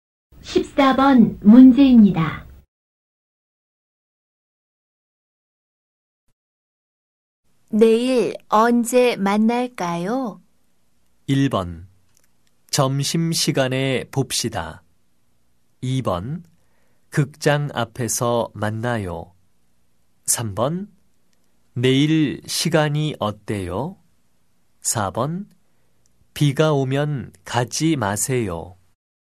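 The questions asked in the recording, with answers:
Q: 내일 언제 만날까요?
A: 1: 점심시간에 봅시다.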